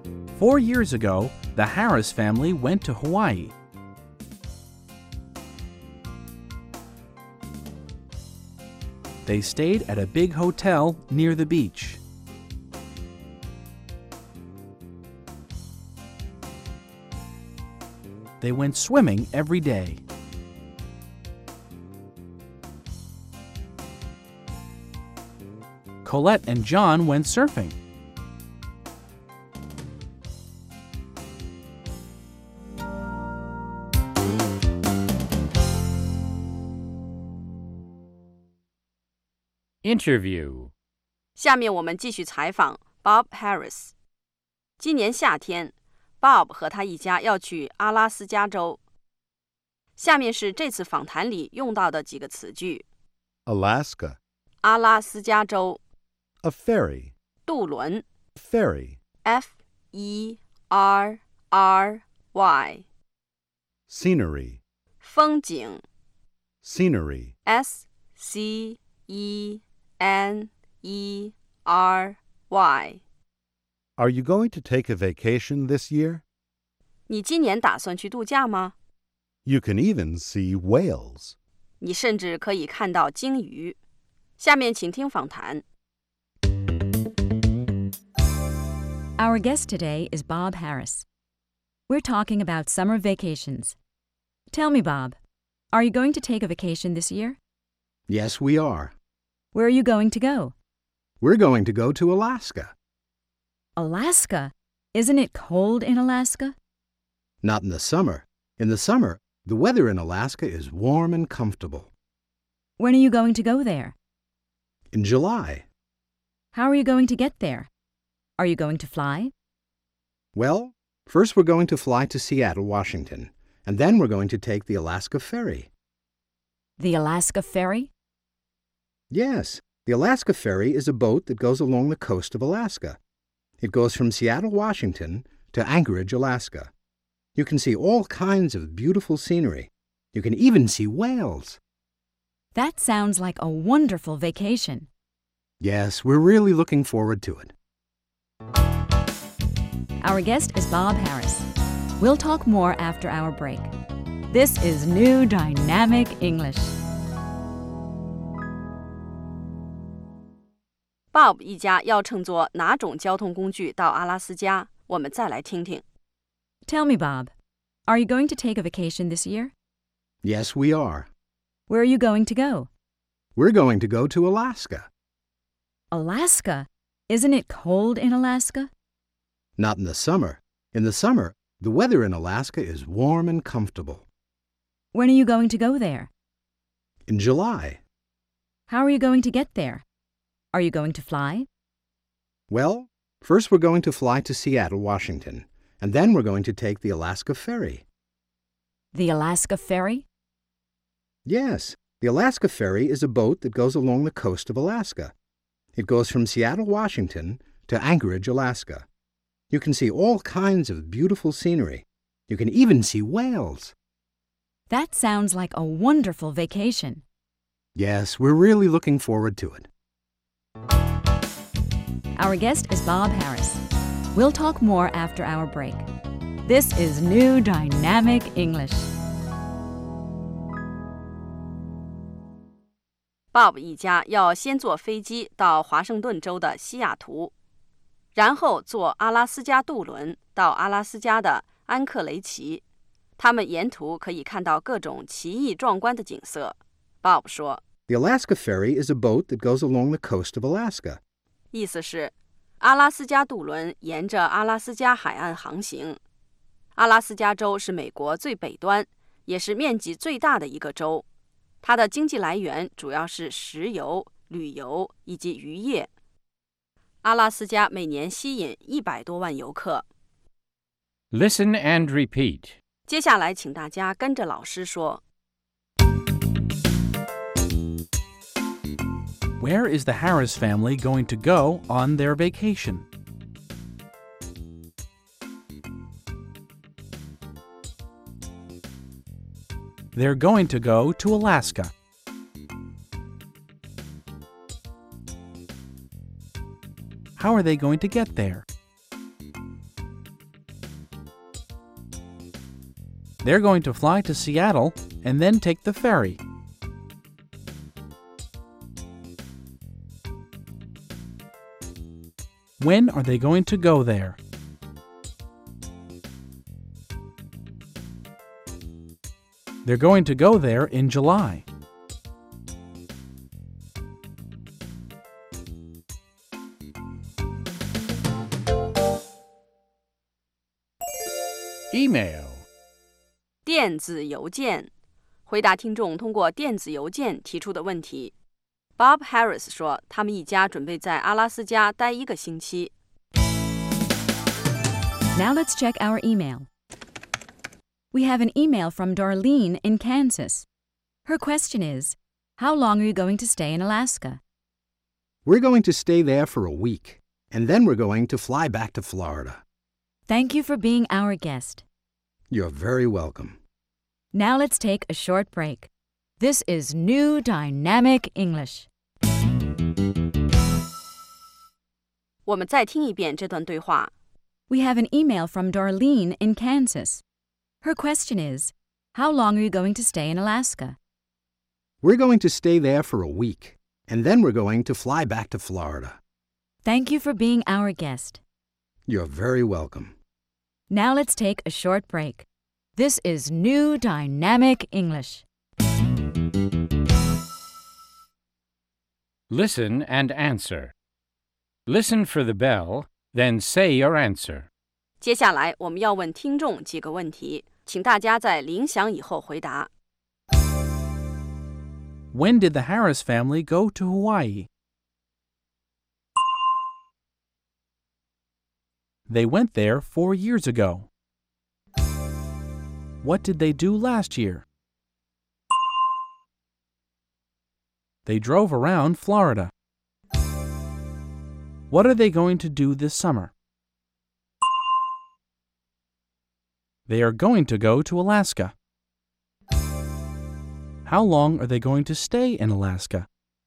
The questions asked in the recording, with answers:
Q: When did the Harris family go to Hawaii?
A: They went there 4 years ago.

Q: What did they do last year?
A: They drove around Florida.

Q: How long are they going to stay in Alaska?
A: They're going to stay there for 1 week.